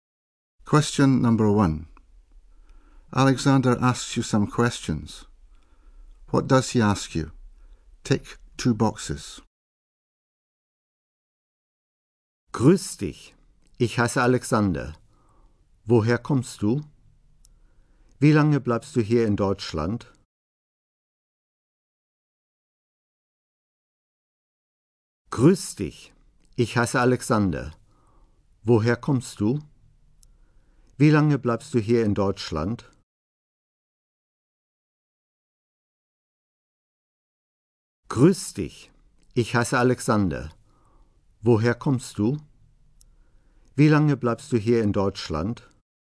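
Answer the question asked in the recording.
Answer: Where you come from and how long you are staying in Germany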